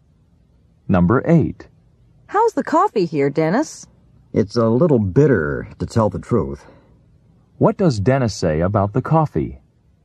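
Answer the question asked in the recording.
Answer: It's a little bitter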